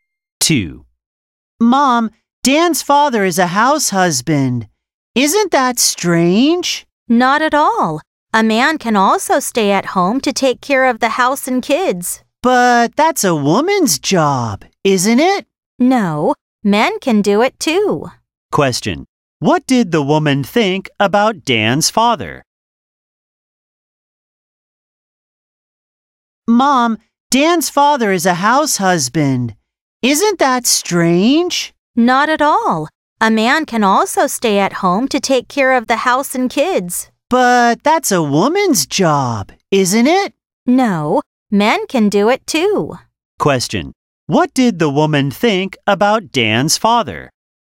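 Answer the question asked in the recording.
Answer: It's not strange; men can take care of the house and kids too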